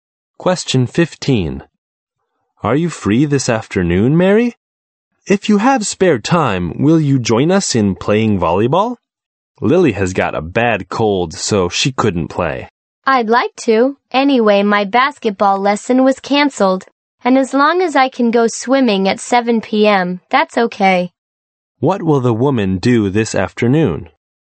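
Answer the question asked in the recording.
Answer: Play volleyball.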